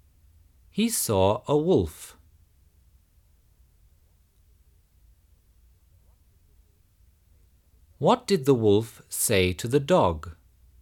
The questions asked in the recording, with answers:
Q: What did the wolf say to the dog?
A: The wolf said, "I know how to help you."